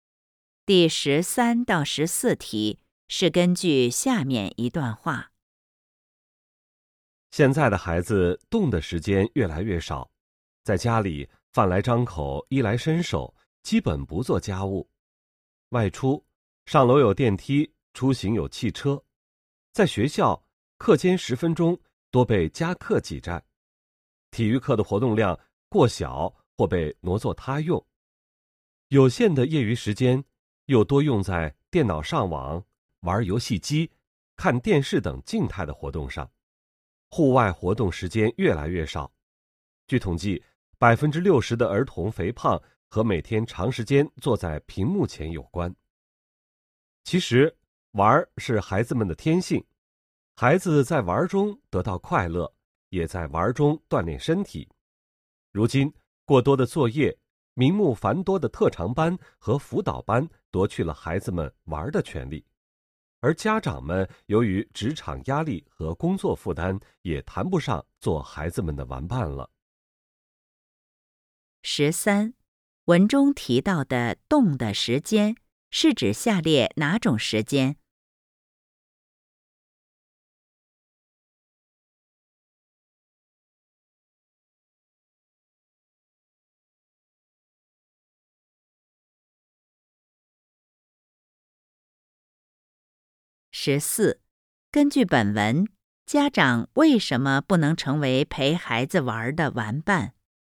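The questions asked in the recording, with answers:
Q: 根据本文,家长为什么不能成为陪孩子玩的玩伴?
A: 职场压力和工作负担大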